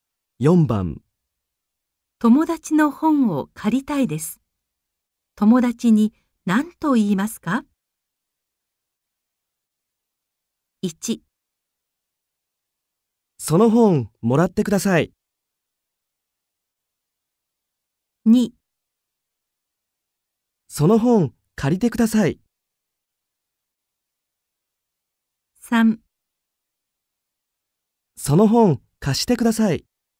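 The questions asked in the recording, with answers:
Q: 友達の本を借りたいです。友達に何と言いますか?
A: 3: その本貸してください。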